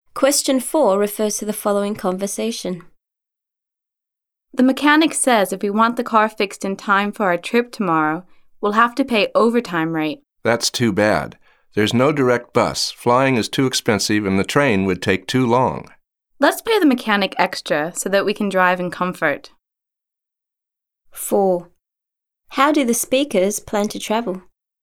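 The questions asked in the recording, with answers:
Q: How do the speakers plan to travel?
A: By car (they'll pay the mechanic extra to fix it)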